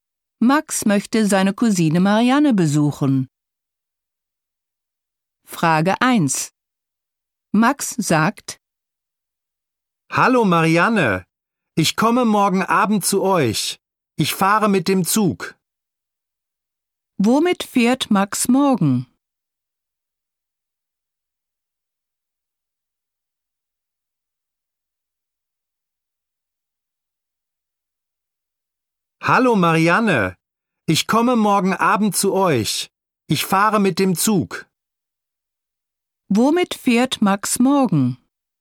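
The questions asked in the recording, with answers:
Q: Womit fährt Max morgen?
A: Mit dem Zug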